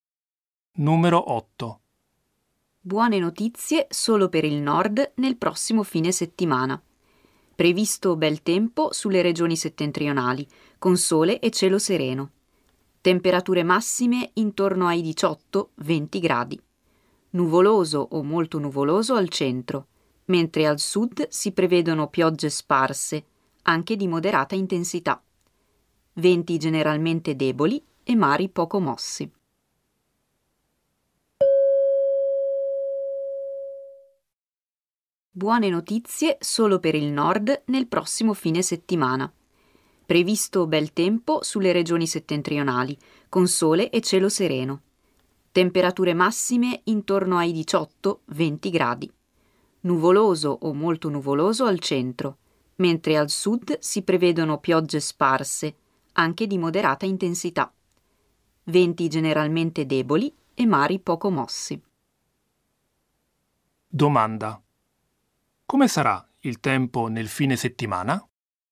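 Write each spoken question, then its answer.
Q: come sarà il tempo nel fine settimana?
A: Bello al nord, nuvoloso al centro, piogge al sud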